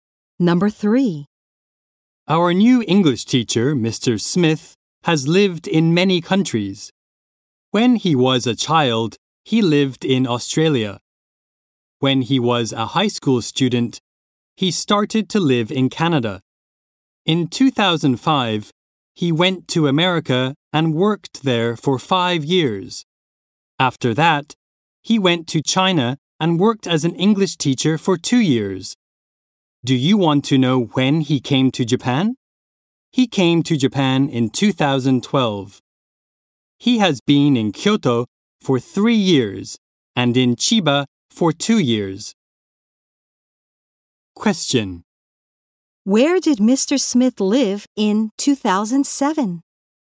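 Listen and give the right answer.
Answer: In America.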